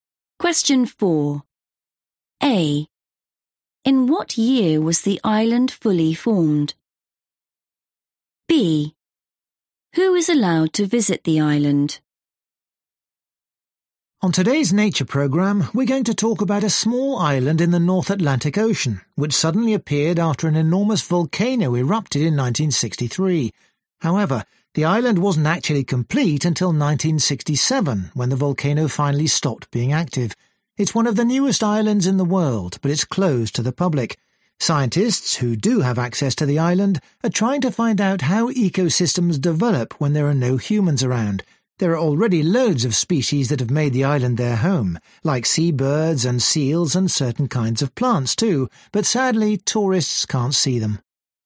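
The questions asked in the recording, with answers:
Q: In what year was the island fully formed?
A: 1967

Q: Who is allowed to visit the island?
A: scientists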